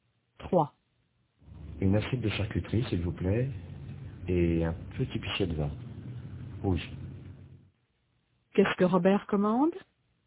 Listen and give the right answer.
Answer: Une assiette de charcuterie et un petit pichet de vin rouge.